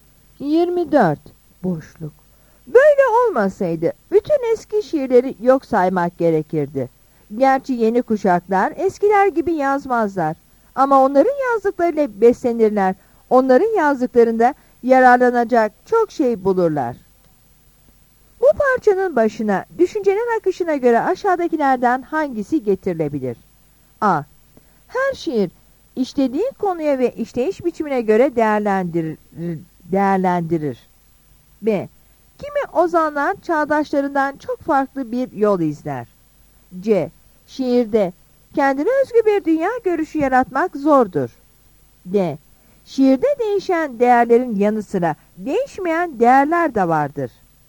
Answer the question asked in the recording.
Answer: Yanıt D'dir.